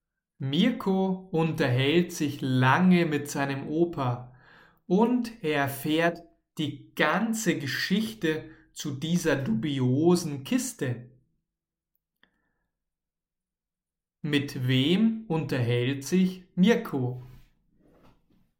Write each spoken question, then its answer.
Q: Mit wem unterhält sich Mirko?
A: Mit seinem Opa natürlich.